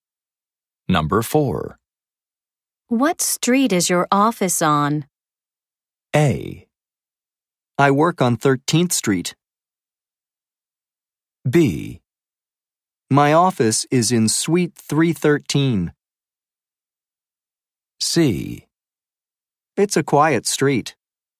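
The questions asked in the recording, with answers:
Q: What street is your office on?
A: A: I work on 13th Street.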